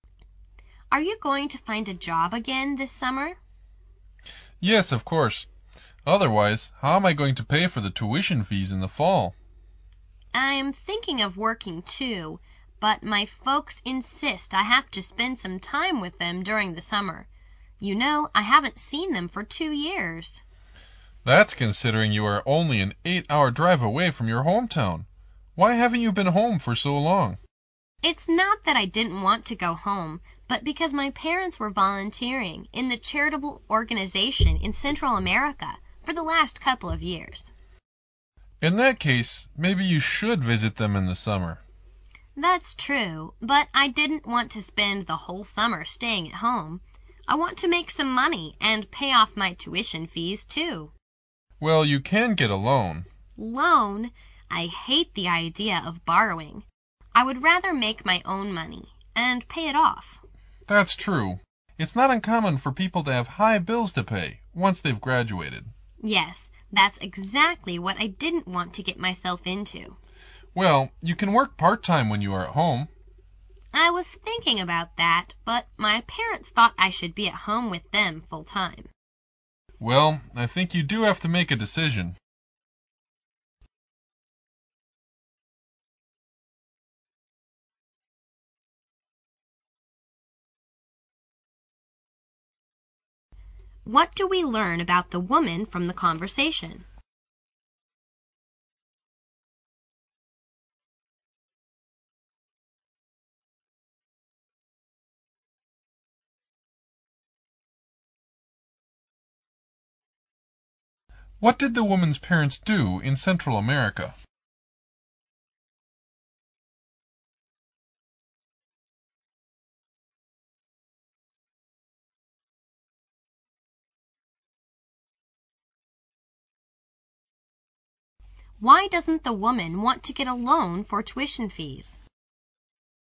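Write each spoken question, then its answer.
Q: What did the woman's parents do in Central America?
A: They volunteered in a charitable organization

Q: Why doesn't the woman want to get a loan for tuition fees?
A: She hates borrowing and would rather earn her own money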